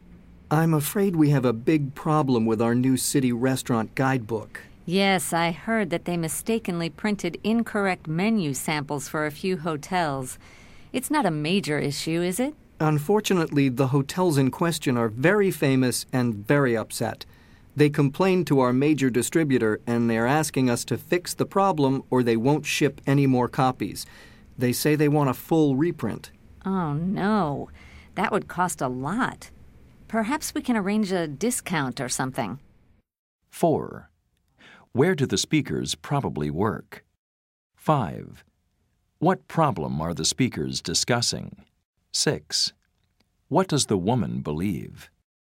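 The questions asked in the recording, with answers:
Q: Where do the speakers probably work?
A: At a publishing company

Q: What problem are the speakers discussing?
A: Incorrect menu samples were printed in the restaurant guidebook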